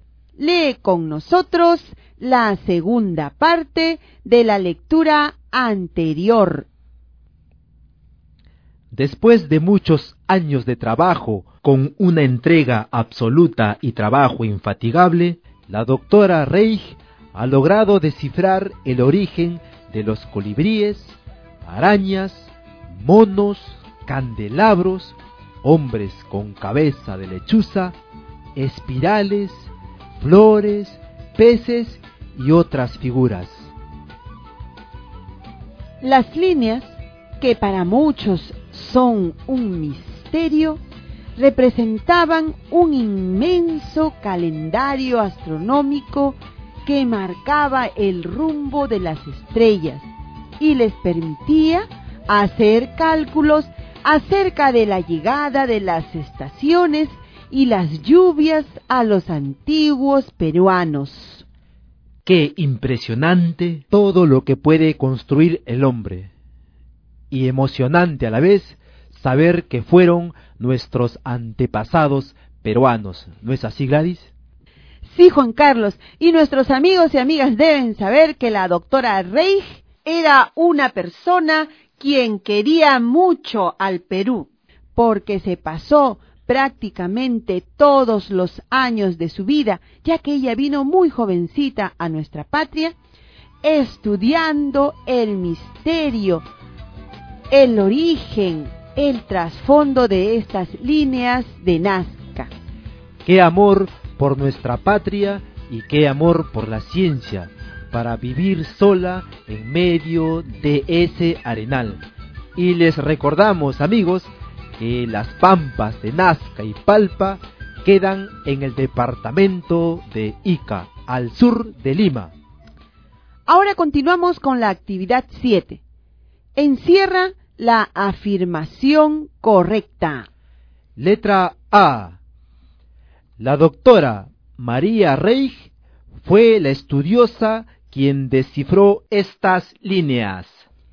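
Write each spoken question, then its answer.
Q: Encierra la afirmación correcta.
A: A: La doctora María Reich fue la estudiosa quien descifró estas líneas.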